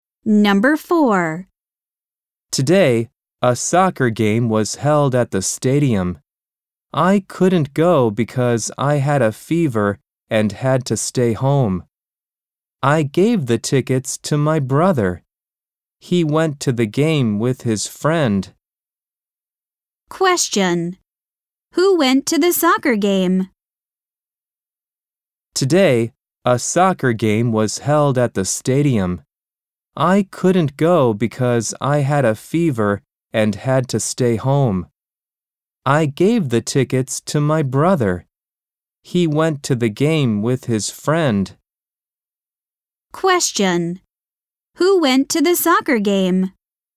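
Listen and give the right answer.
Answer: The speaker's brother and his friend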